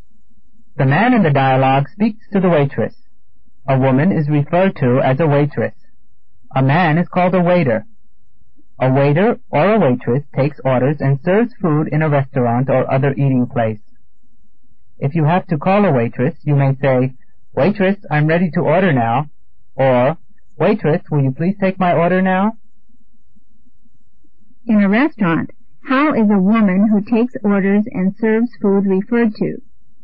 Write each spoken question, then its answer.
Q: In a restaurant, how is a woman who takes orders and serves food referred to?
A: A waitress. She is referred to as a waitress.